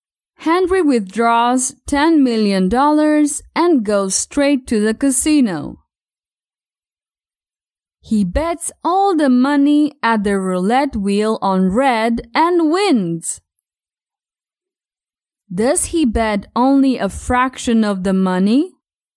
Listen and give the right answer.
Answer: No, he doesn't bet only a fraction of the money.